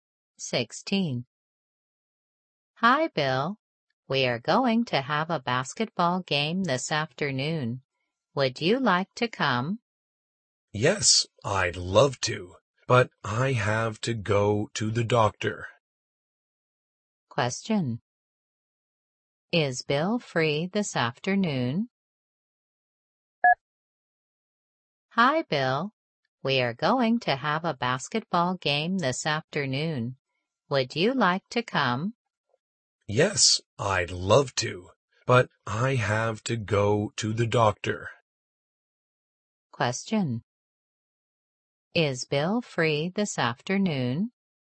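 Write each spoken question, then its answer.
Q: Is Bill free this afternoon?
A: No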